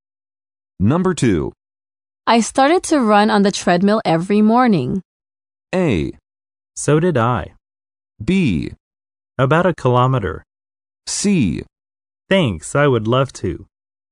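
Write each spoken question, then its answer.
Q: I started to run on the treadmill every morning.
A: A: So did I.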